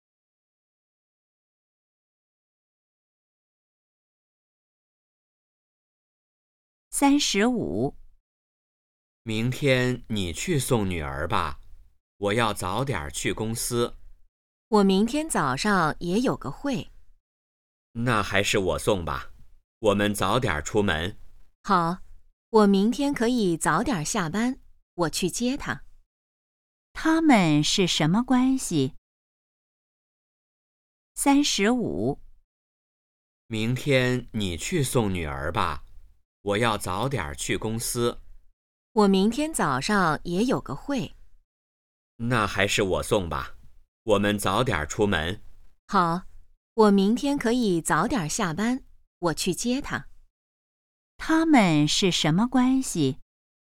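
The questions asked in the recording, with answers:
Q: 他们是什么关系?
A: 夫妻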